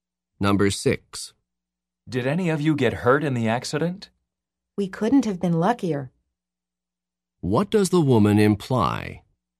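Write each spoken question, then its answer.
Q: What does the woman imply?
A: They were very lucky; nobody was hurt.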